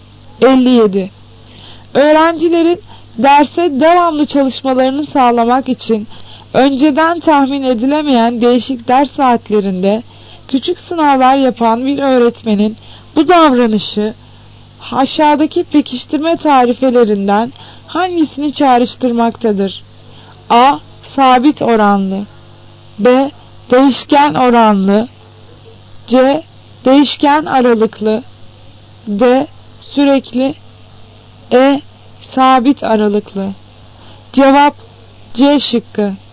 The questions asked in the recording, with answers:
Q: Öğrencilerin derse devamlı çalışmalarını sağlamak için önceden tahmin edilemeyen değişik ders saatlerinde küçük sınavlar yapan bir öğretmenin bu davranışı aşağıdaki pekiştirme tarifelerinden hangisini çağrıştırmaktadır?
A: Cevap C şıkkı. Değişken aralıklı.